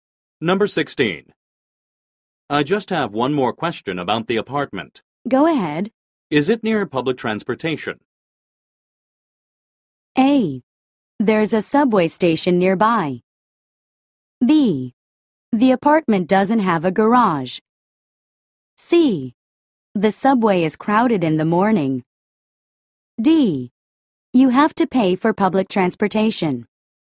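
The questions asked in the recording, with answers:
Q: Is it near public transportation?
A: A: There's a subway station nearby.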